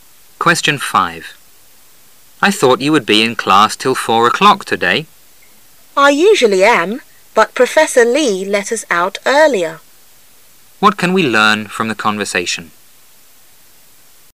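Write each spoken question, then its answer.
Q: What can we learn from the conversation?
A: Professor Lee let the class out earlier than usual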